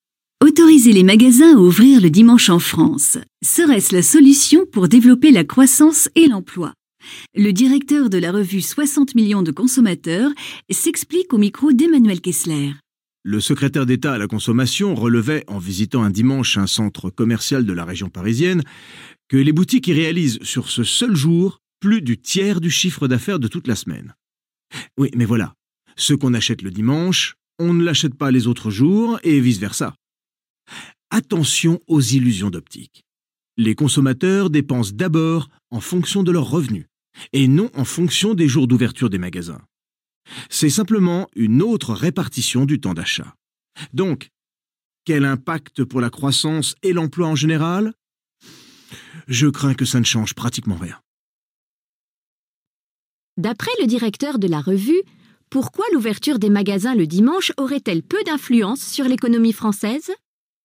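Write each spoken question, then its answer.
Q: D'après le directeur de la revue, pourquoi l'ouverture des magasins le dimanche aurait-elle peu d'influence sur l'économie française ?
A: Parce que les consommateurs dépensent en fonction de leurs revenus : ce qu'on achète le dimanche, on ne l'achète pas les autres jours, c'est seulement une autre répartition des achats.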